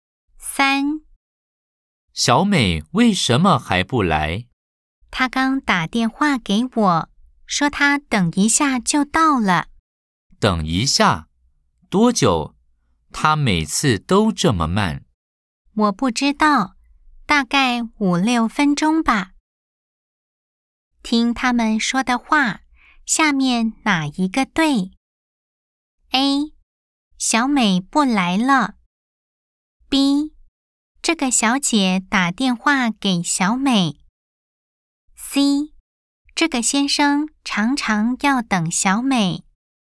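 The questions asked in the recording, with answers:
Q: 听他们说的话,下面哪一个对?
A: C: 这个先生常常要等小美。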